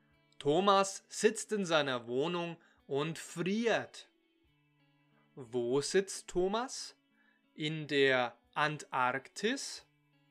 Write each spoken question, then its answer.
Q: Wo sitzt Thomas? In der Antarktis?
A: Nein, Thomas sitzt nicht in der Antarktis, er sitzt in seiner Wohnung.